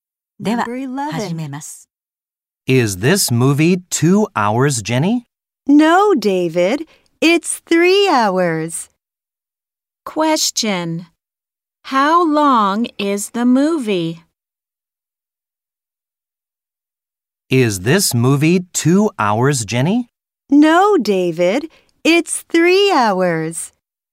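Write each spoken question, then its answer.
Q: How long is the movie?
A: 3 hours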